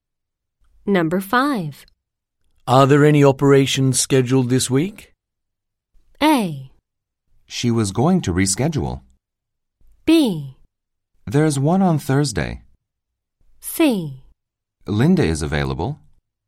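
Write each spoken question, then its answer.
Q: Are there any operations scheduled this week?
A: B: There's one on Thursday.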